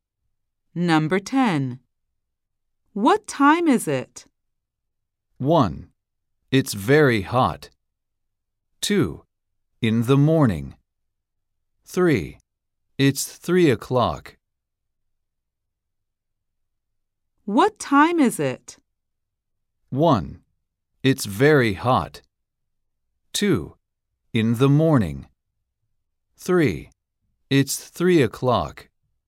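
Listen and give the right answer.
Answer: 3: It's 3 o'clock.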